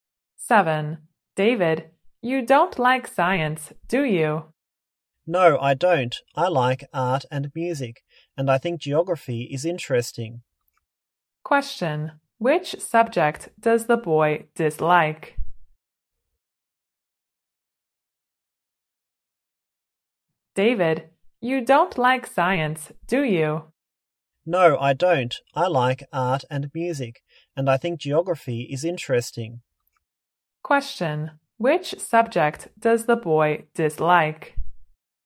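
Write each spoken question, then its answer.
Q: Question, which subject does the boy dislike?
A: Science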